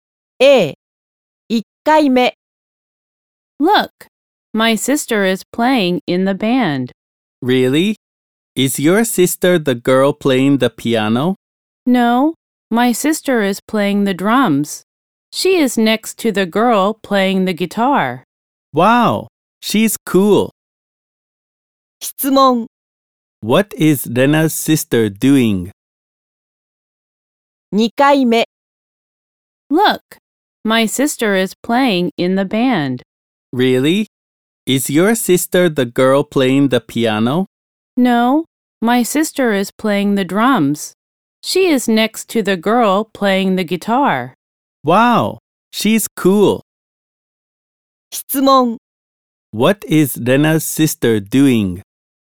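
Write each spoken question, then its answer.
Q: What is Lena's sister doing?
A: She is playing the drums.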